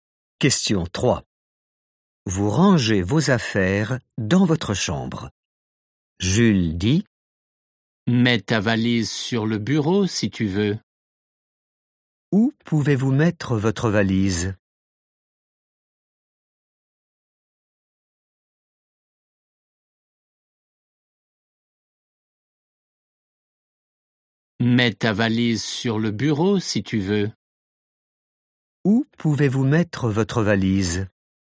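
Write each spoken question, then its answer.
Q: Où pouvez-vous mettre votre valise?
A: sur le bureau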